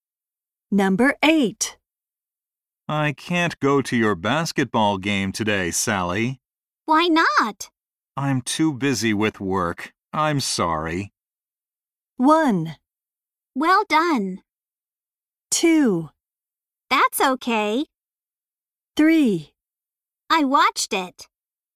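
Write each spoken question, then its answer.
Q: I'm too busy with work. I'm sorry.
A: 2: That's okay.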